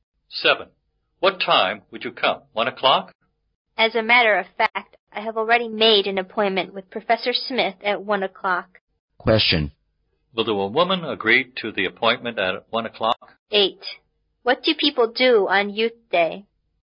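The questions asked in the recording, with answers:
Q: Will the woman agree to the appointment at 1 o'clock?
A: No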